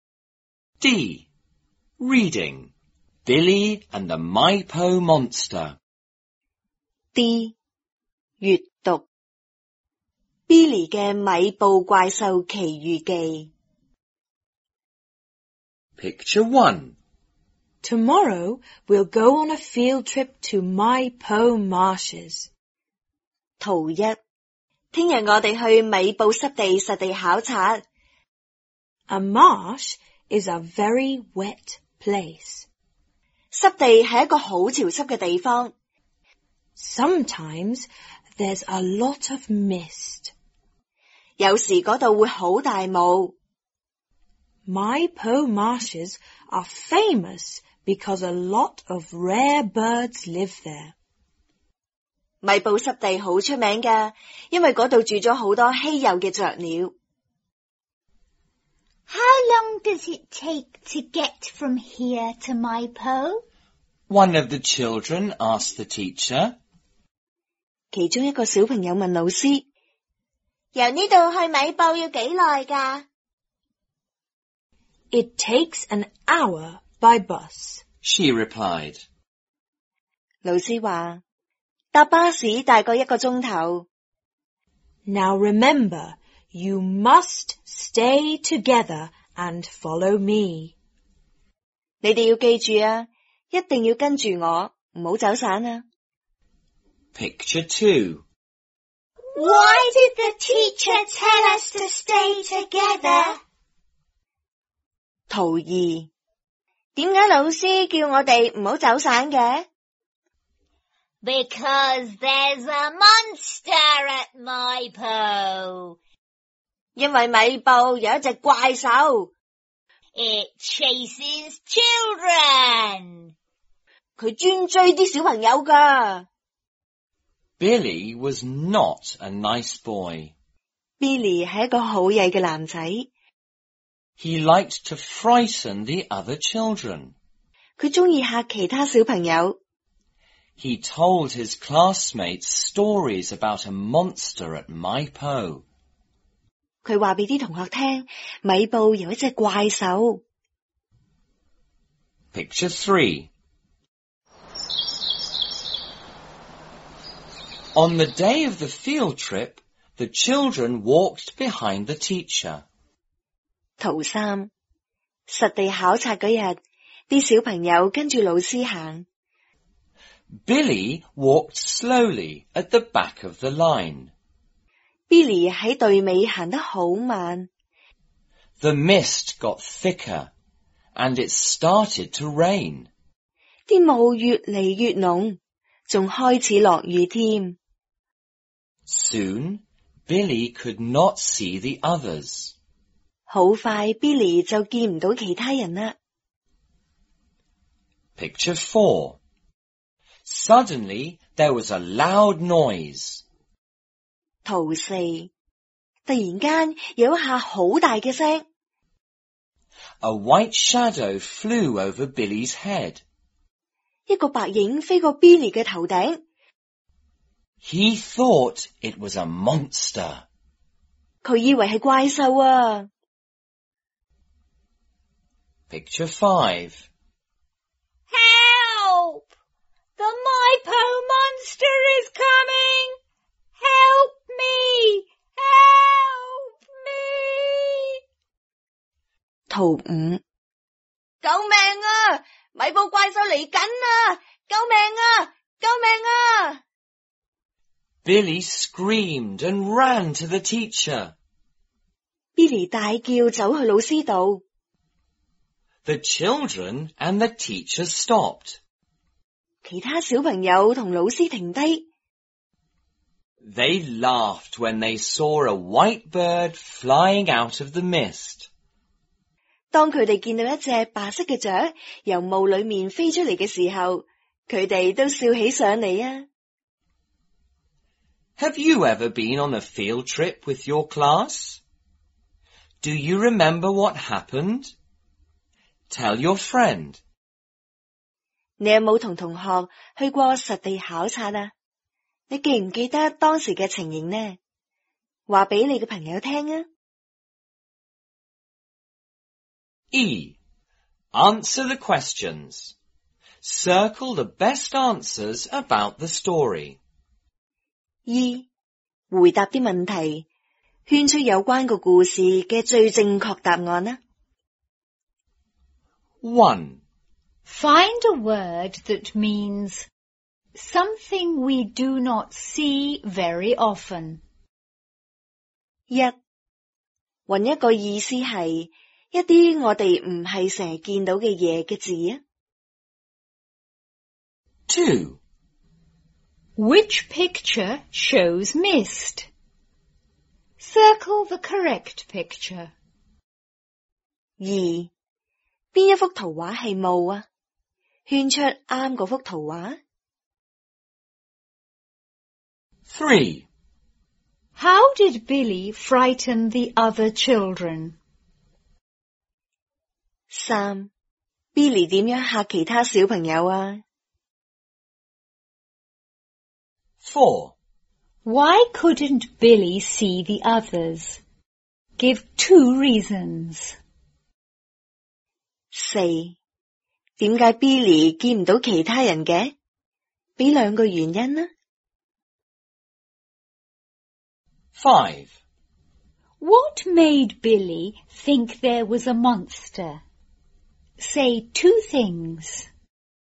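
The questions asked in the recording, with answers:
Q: Find a word that means something we do not see very often.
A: rare

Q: How did Billy frighten the other children?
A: He told them stories about a monster at Maipo.

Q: Why couldn't Billy see the others?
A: He walked slowly at the back of the line, and the mist got thicker and it started to rain.

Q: What made Billy think there was a monster?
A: There was a loud noise and a white shadow flew over his head.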